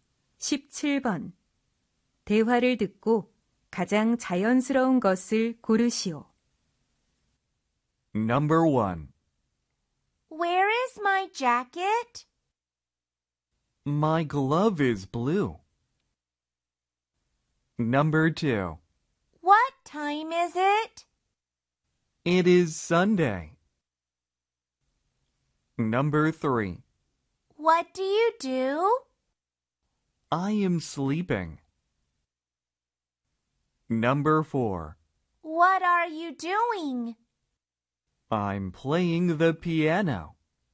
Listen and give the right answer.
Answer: 바로 정답은 4번이에요.